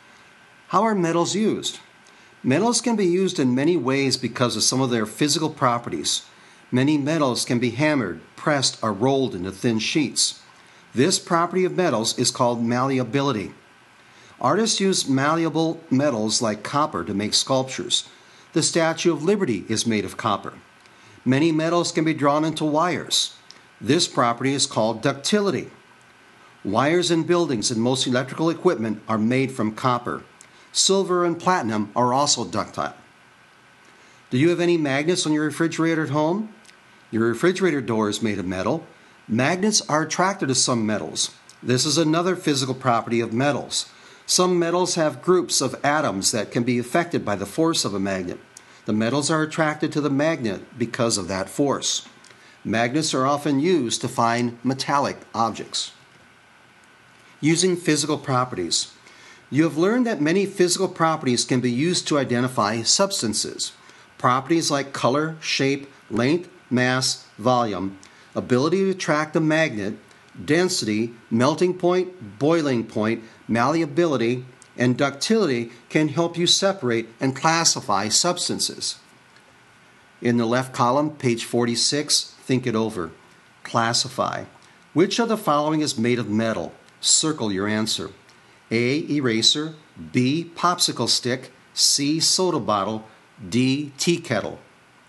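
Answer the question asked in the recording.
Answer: D: tea kettle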